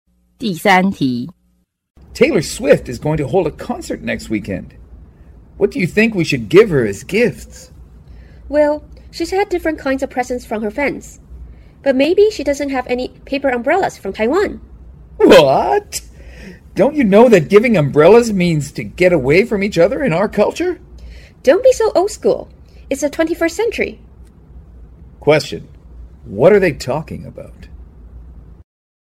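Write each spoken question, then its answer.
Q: What are they talking about?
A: What gifts to give Taylor Swift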